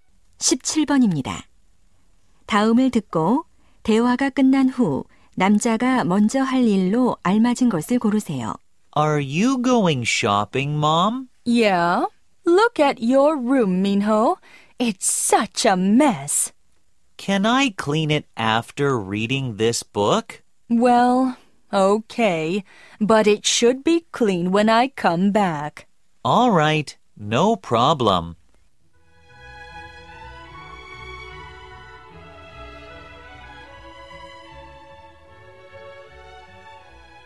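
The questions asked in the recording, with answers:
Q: 다음을 듣고 대화가 끝난 후 남자가 먼저 할 일로 알맞은 것을 고르세요.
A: 책 읽기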